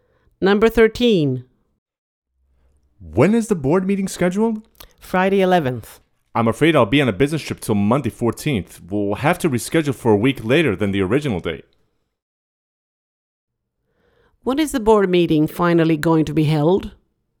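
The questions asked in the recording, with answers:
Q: When is the board meeting finally going to be held?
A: Friday 18th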